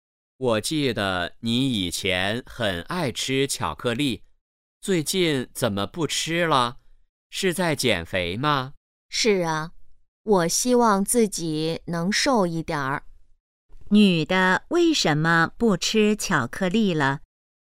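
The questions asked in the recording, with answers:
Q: 女的为什么不吃巧克力了?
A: 在减肥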